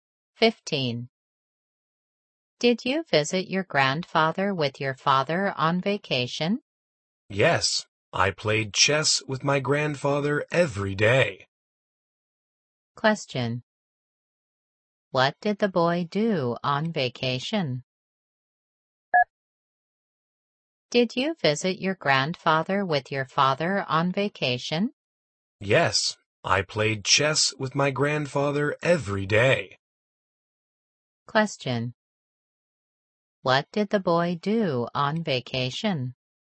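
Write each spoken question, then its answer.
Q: What did the boy do on vacation?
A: He played chess with his grandfather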